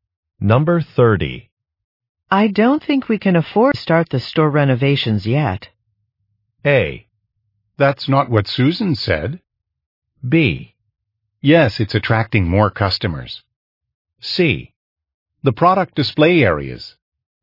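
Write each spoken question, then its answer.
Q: I don't think we can afford to start the store renovations yet.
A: A: That's not what Susan said.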